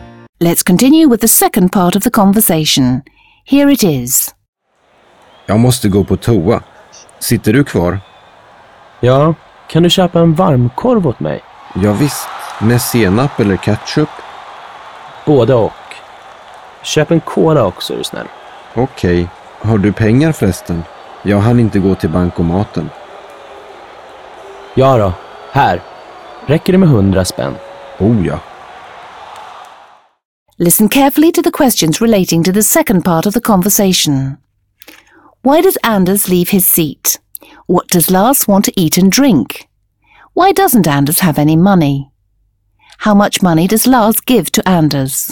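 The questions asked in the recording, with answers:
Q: Why does Anders leave his seat?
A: He needs to go to the toilet

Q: What does Lars want to eat and drink?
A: A hot dog with mustard and ketchup, and a cola

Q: Why doesn't Anders have any money?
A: He didn't have time to go to the cash machine

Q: How much money does Lars give to Anders?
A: 100 kronor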